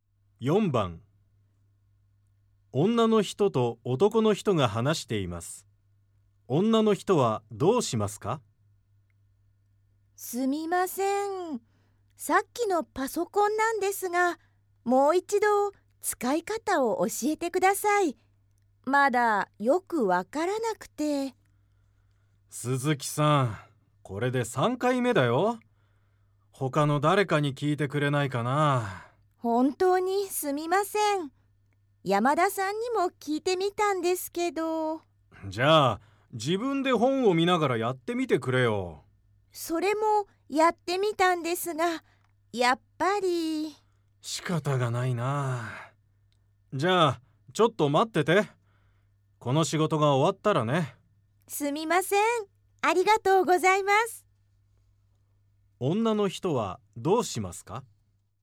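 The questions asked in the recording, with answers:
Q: 女の人はどうしますか?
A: 男の人の仕事が終わるまで待って、パソコンの使い方を教えてもらう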